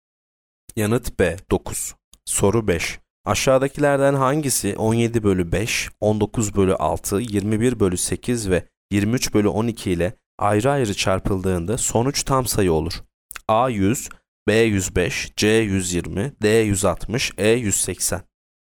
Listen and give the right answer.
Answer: Yanıt C 120.